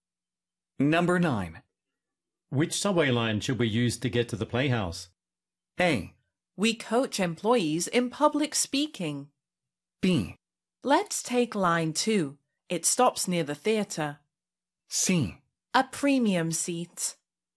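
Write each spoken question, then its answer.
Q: Which subway line should we use to get to the playhouse?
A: B: Let's take line 2. It stops near the theater.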